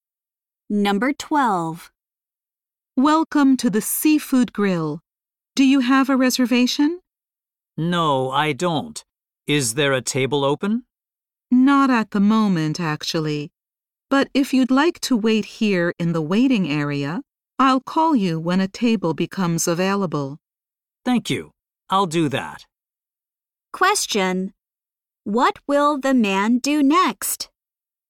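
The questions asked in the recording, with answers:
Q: What will the man do next?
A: Wait in the waiting area for a table.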